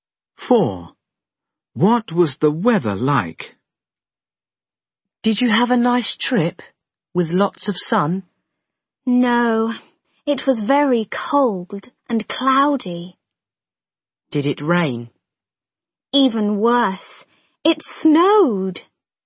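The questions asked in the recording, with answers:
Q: What was the weather like?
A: cold, cloudy and snowy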